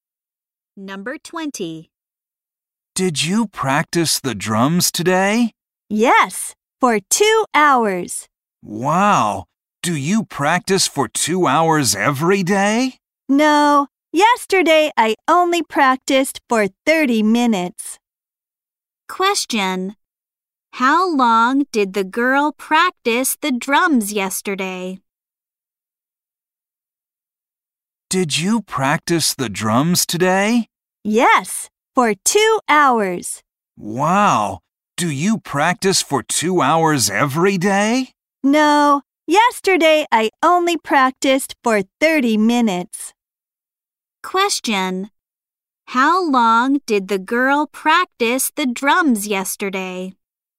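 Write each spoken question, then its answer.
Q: How long did the girl practice the drums yesterday?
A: For 30 minutes.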